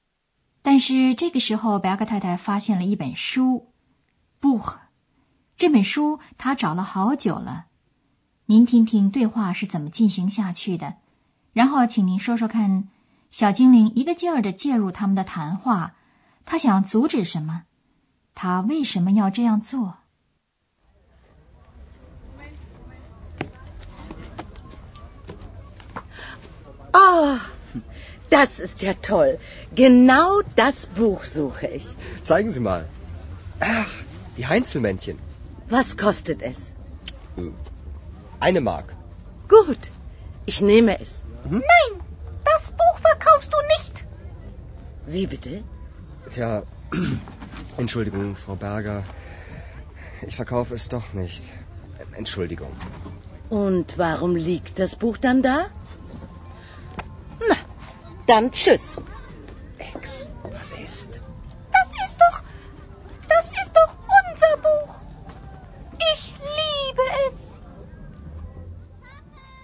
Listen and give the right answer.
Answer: 小精灵想阻止安德烈斯卖掉这本关于家神的书。